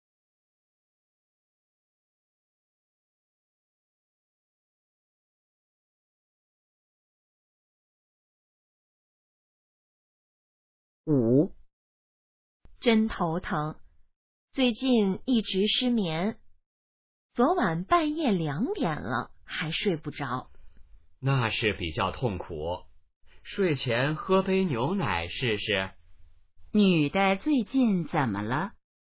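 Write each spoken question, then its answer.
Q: 女的最近怎么了?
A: 失眠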